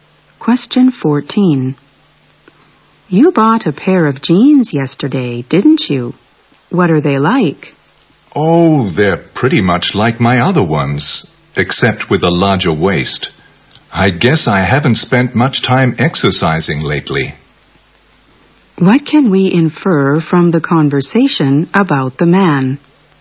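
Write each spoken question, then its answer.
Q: What can we infer from the conversation about the man?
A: He has put on weight because he hasn't exercised lately.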